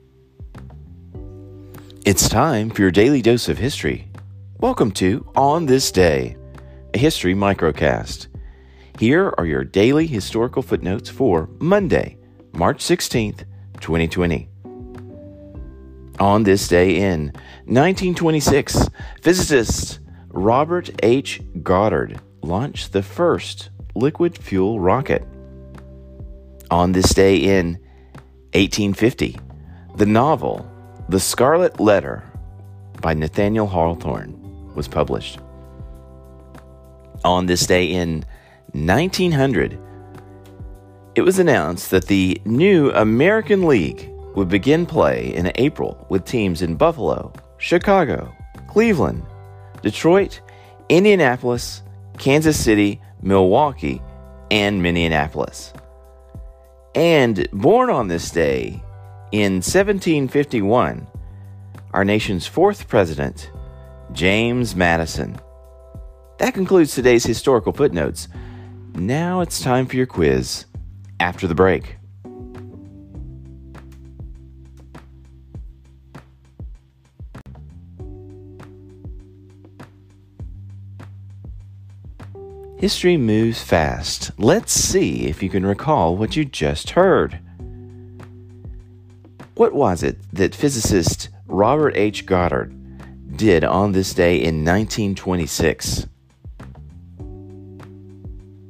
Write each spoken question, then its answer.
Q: What was it that physicist Robert H. Goddard did on this day in 1926?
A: On this day in 1926, Robert H. Goddard launched the first liquid fuel rocket.